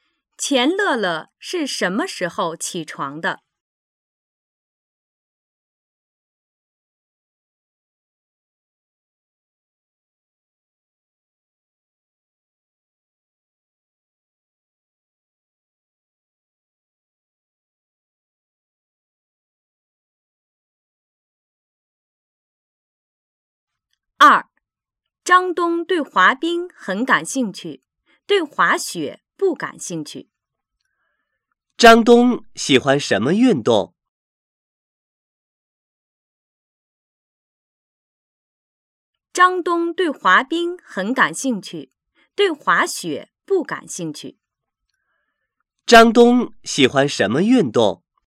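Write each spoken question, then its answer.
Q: 张东喜欢什么运动?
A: 滑冰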